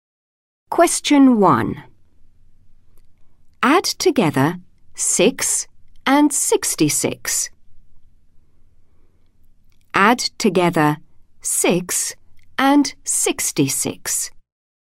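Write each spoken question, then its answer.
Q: Add together 6 and 66.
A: 72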